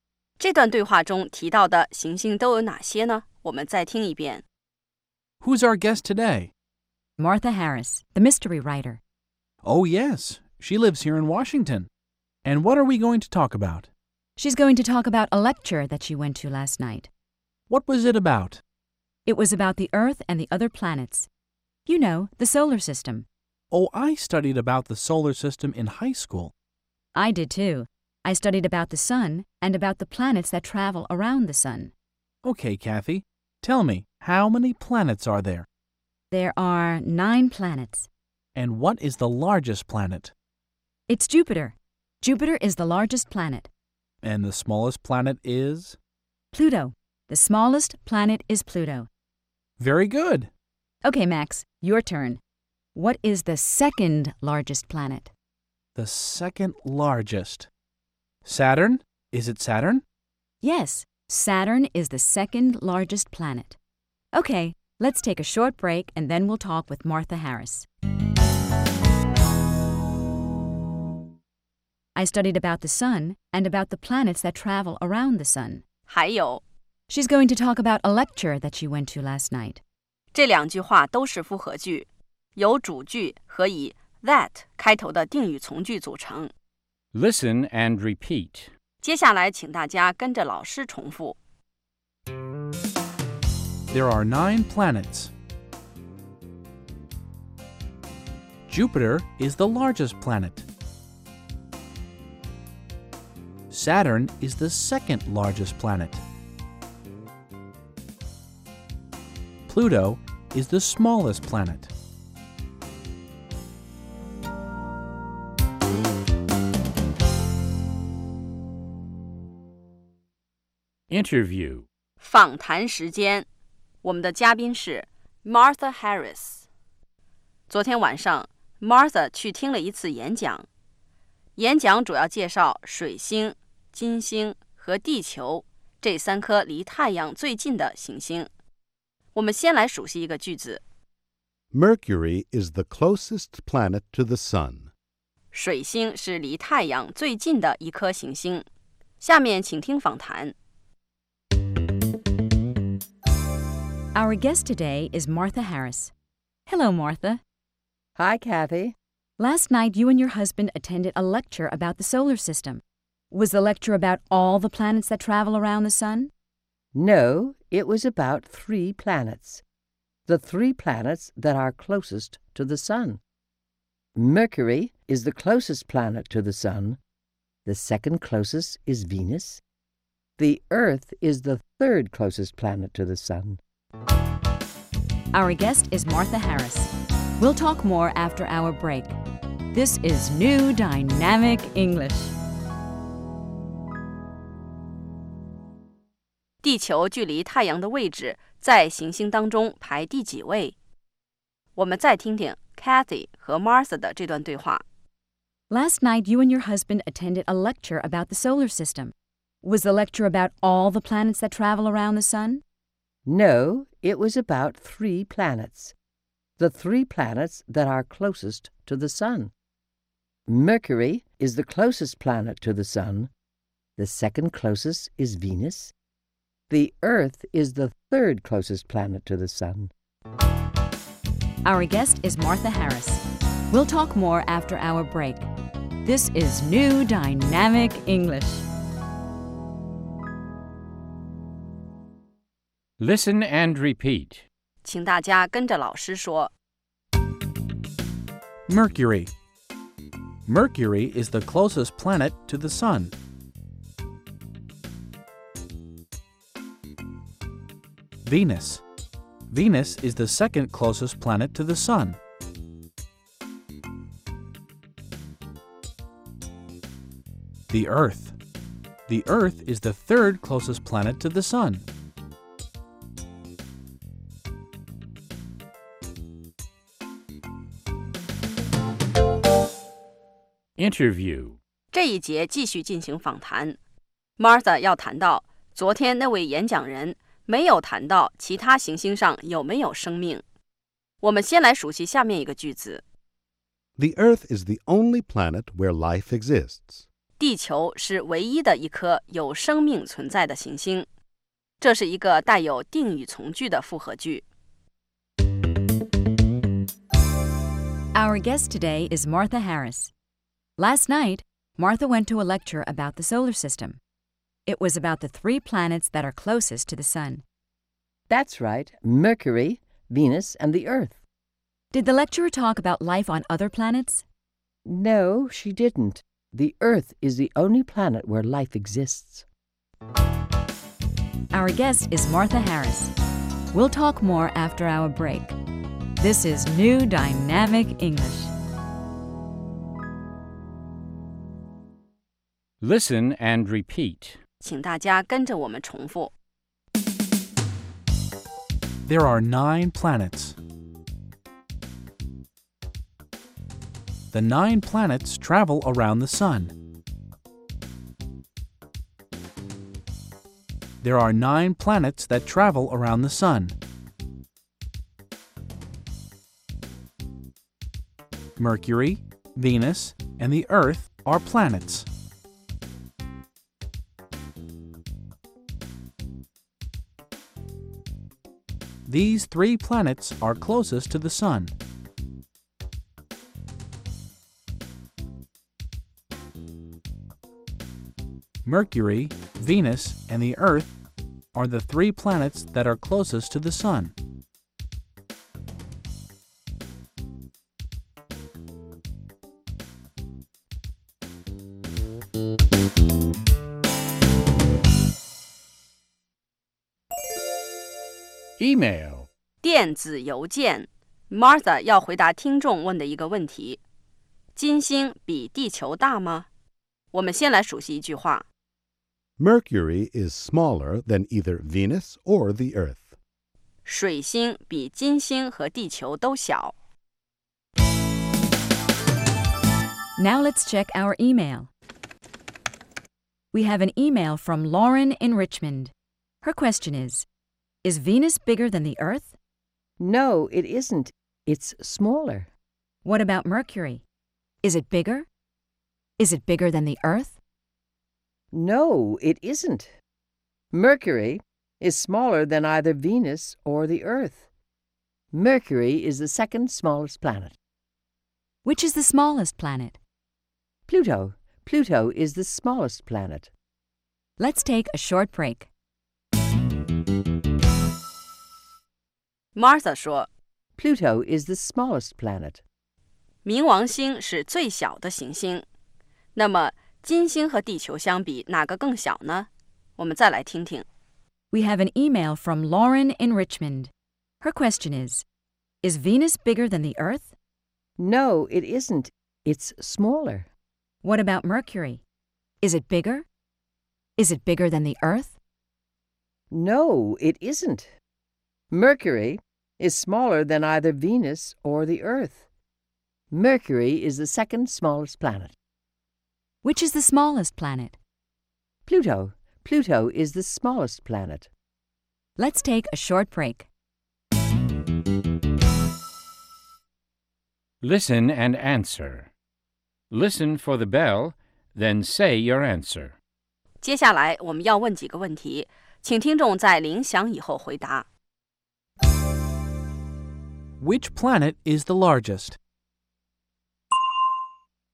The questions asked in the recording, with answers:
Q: Which planet is the largest?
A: Jupiter is the largest planet.